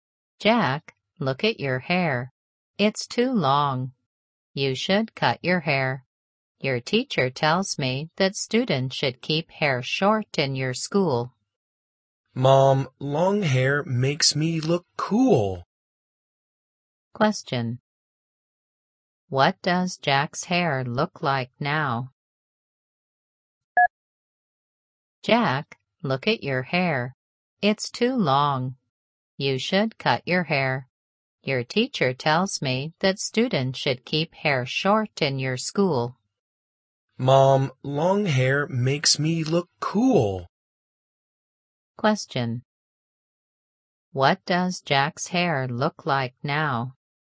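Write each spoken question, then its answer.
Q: What does Jack's hair look like now?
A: It's long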